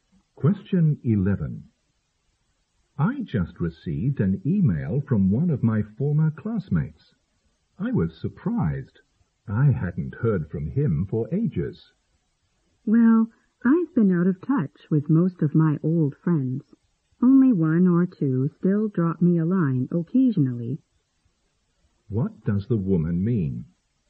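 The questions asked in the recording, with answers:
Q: What does the woman mean?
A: She has lost contact with most of her old friends; only one or two still write to her occasionally.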